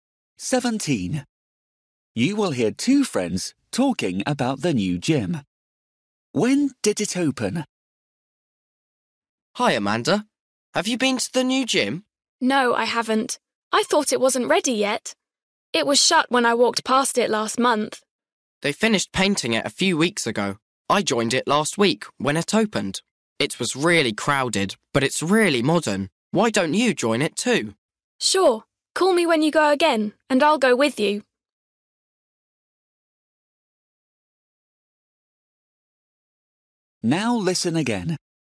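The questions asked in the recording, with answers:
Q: When did it open?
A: Last week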